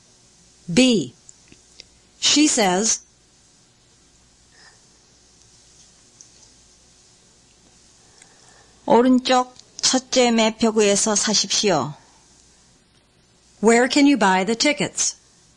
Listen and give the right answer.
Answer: 'You can buy them at the first ticket window on the right.